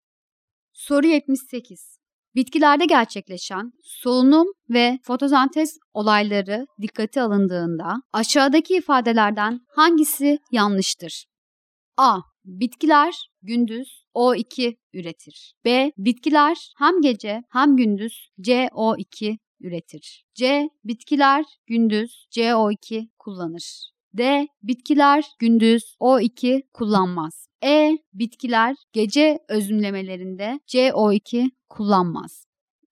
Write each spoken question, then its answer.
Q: Bitkilerde gerçekleşen solunum ve fotosentez olayları dikkate alındığında aşağıdaki ifadelerden hangisi yanlıştır?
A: Doğru cevap D şıkkı.